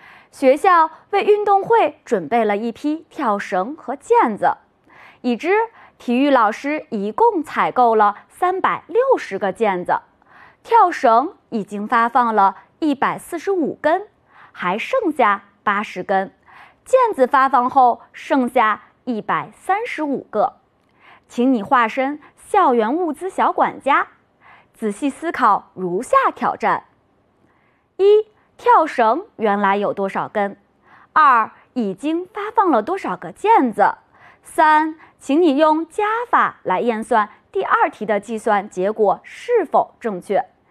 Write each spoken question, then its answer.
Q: 跳绳原来有多少根?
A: 加80等于225,单位名称根。

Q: 已经发放了多少个毽子?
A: 所以列示为360减135等于225个。